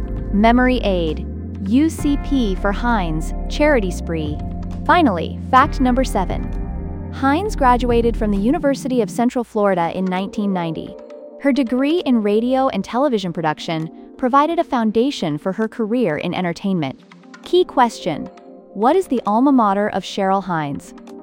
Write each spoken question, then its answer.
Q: what is the alma mater of Cheryl Hines?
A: University of Central Florida.